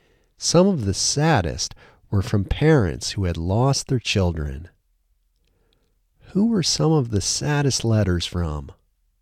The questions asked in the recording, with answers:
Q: Who were some of the saddest letters from?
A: Some of the saddest letters were from parents who had lost their children.